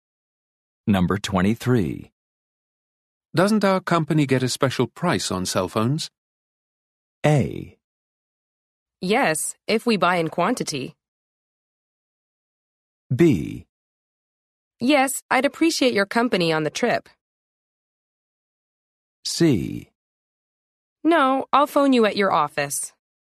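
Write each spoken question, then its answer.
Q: Doesn't our company get a special price on cell phones?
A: A: Yes, if we buy in quantity.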